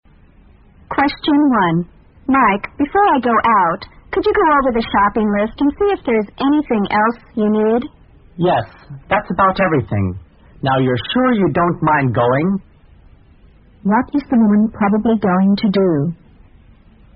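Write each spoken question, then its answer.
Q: What is the woman probably going to do?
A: Go shopping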